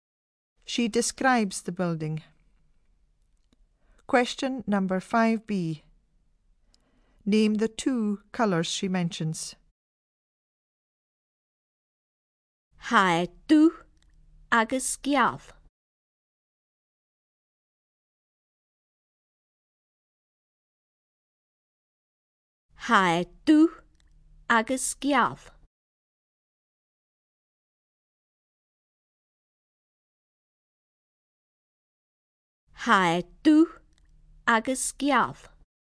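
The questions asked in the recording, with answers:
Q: Name the 2 colours she mentions.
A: black and white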